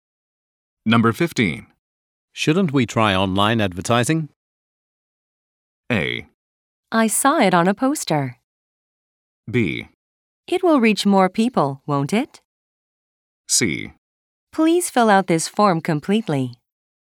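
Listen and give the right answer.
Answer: B: It will reach more people, won't it?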